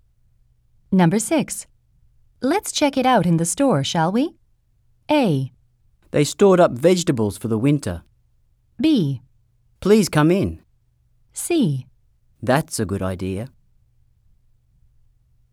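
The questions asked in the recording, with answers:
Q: Let's check it out in the store, shall we?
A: C: That's a good idea.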